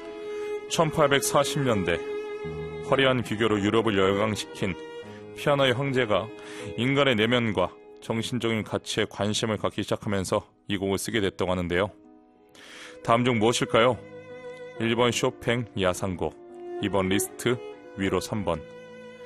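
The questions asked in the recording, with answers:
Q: 다음 중 무엇일까요?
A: 2: 리스트, 위로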